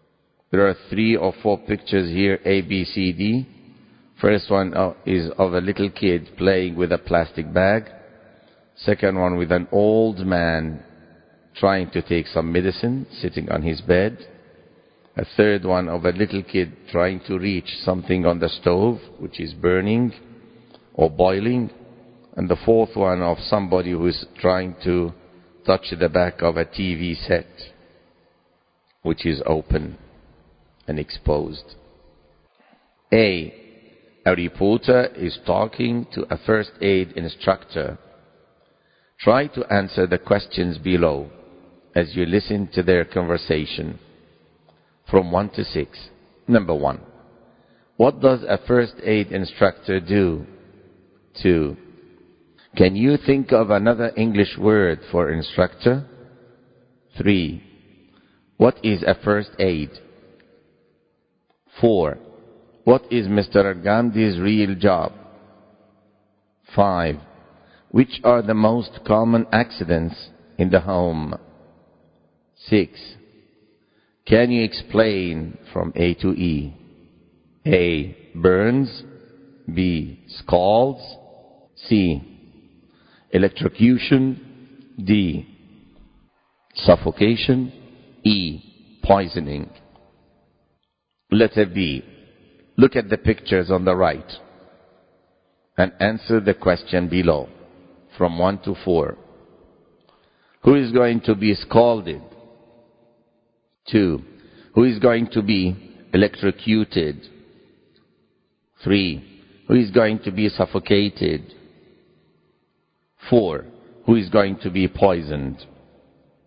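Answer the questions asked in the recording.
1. The little kid reaching for something boiling on the stove
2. The person touching the back of the open TV set
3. The little kid playing with a plastic bag
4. The old man taking medicine on his bed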